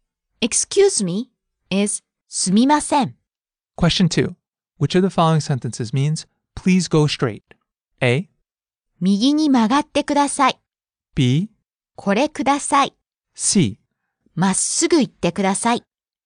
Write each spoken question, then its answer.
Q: Which of the following sentences means, please go straight?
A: C. まっすぐ行ってください。